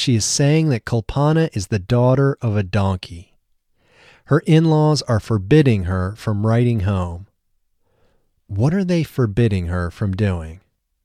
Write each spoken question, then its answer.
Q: What are they forbidding her from doing?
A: They are forbidding her from writing home.